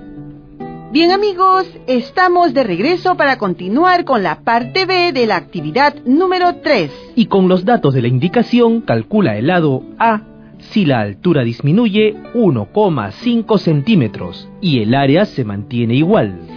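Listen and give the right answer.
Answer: 12 centímetros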